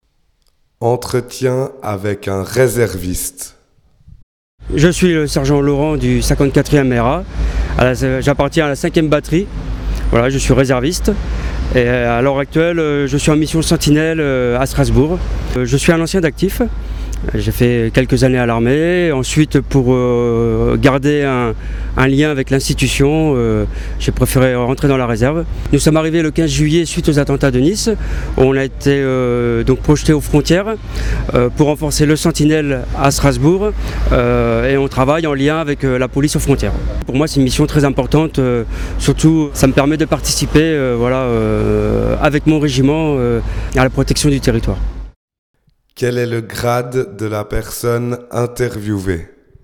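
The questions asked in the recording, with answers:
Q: Quel est le grade de la personne interviewée ?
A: Sergent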